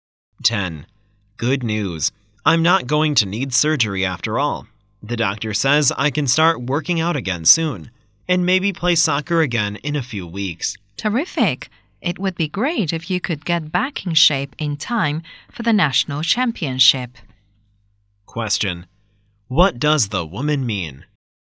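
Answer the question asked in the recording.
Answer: She hopes he will recover in time for the national championship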